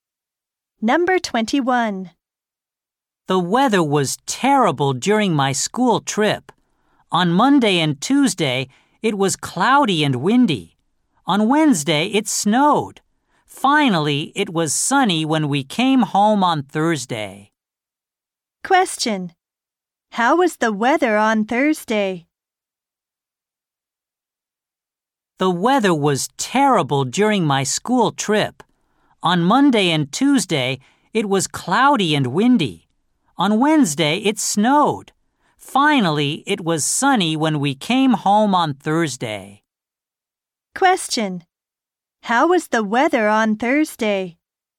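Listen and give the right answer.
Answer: It was sunny.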